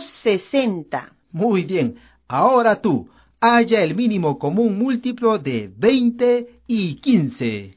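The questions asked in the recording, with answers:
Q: Ahora tú, halla el mínimo común múltiplo de 20 y 15.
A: 60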